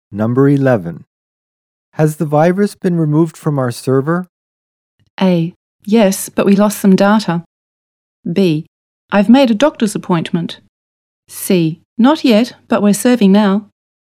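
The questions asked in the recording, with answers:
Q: Has the virus been removed from our server?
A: A: Yes, but we lost some data.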